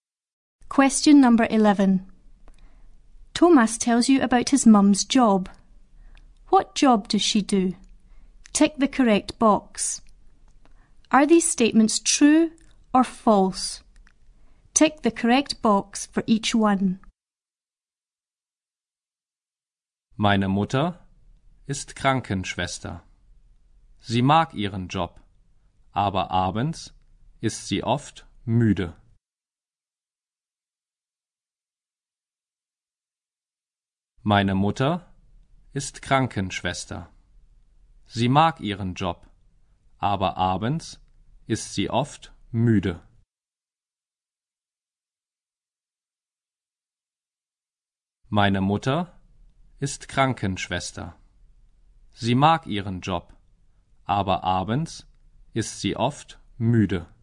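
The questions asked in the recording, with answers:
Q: What job does she do?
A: She is a nurse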